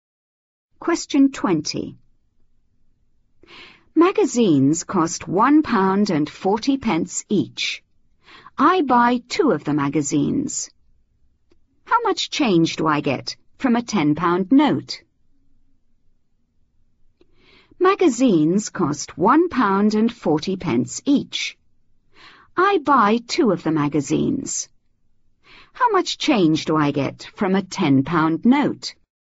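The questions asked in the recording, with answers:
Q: How much change do I get from a £10 note?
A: £7.20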